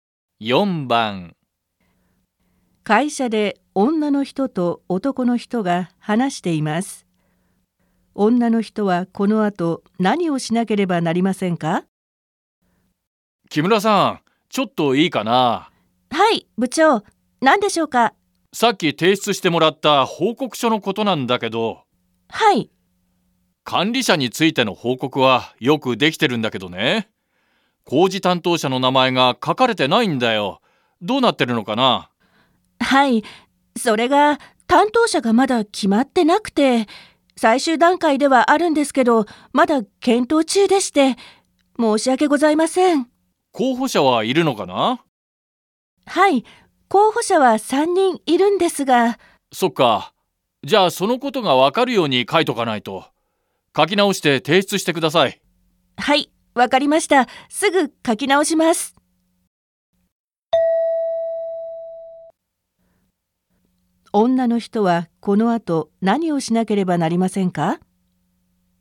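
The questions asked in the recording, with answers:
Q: 女の人はこの後何をしなければなりませんか?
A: 報告書を書き直して提出する(候補者が3人いて検討中だとわかるように)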